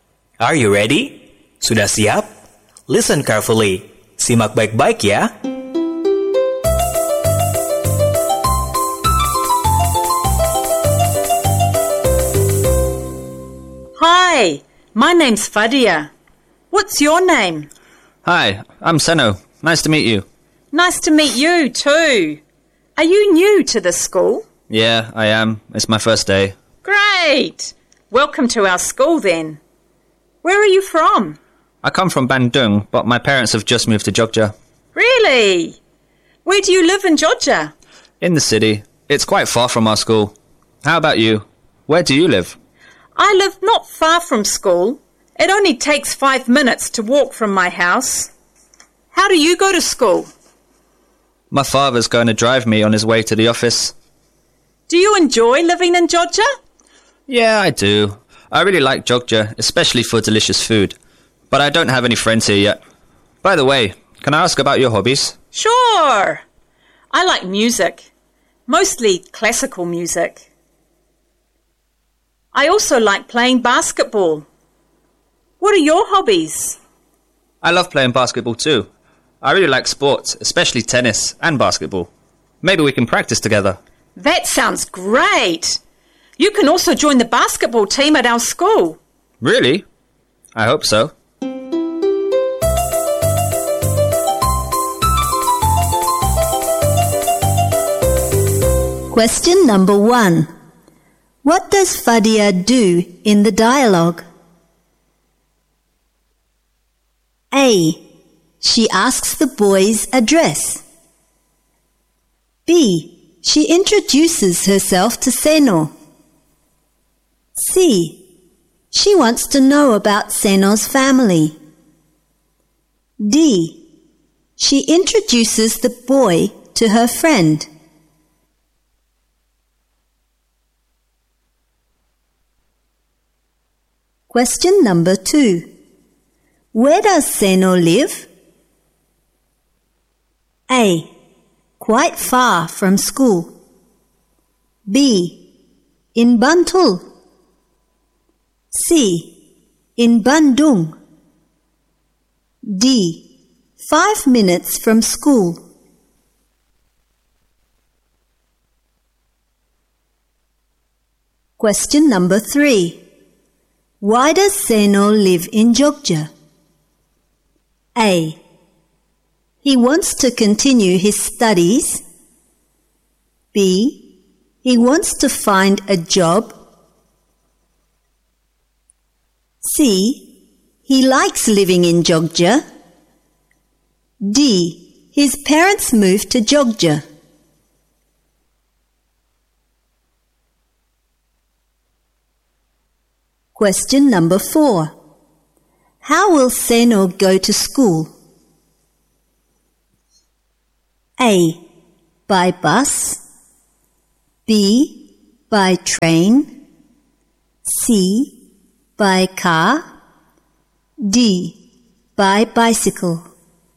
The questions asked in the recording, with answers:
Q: What does Fadia do in the dialogue?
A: B. She introduces herself to Seno.

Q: Where does Senno live?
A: A. Quite far from school.

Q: Why does Senno live in Jogja?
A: D. Ya, benar. D.

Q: How will Senno go to school?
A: C. By car.